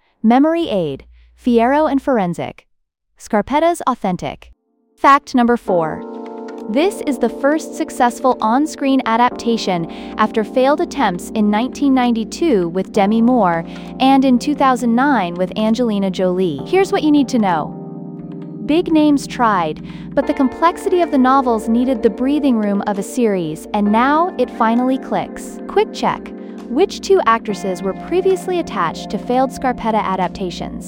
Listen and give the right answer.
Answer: Demi Moore and Angelina Jolie.